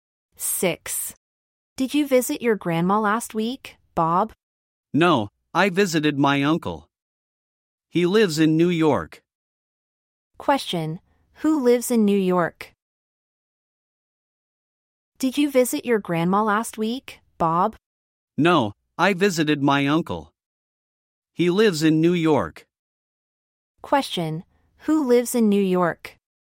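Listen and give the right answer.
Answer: Bob's uncle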